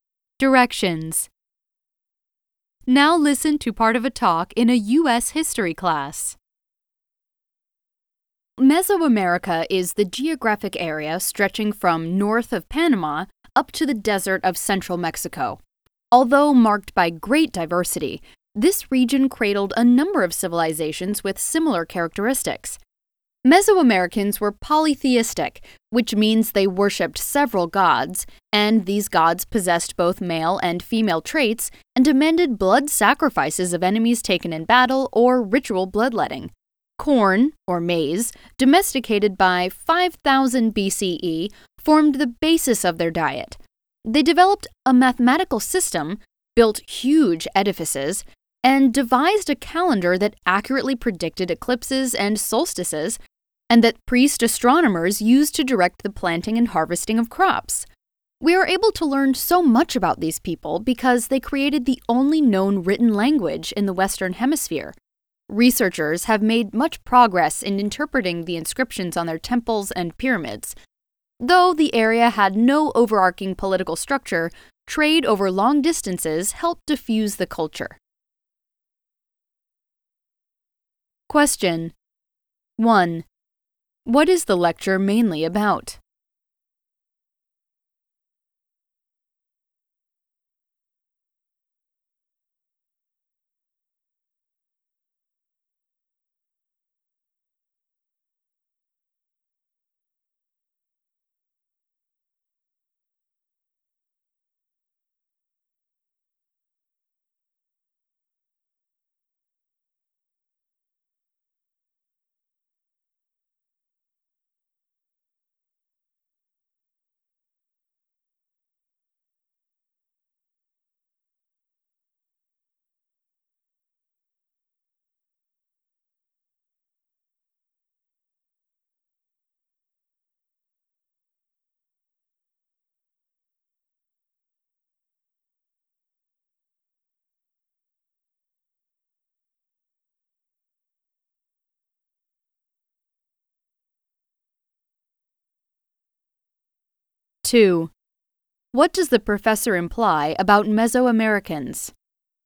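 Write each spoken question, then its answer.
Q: What is the lecture mainly about?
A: The shared characteristics of Mesoamerican civilizations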